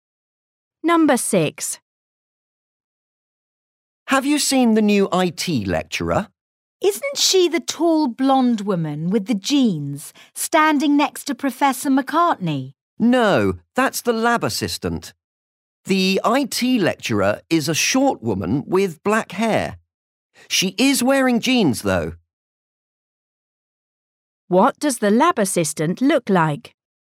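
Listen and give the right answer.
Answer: tall, blonde, wearing jeans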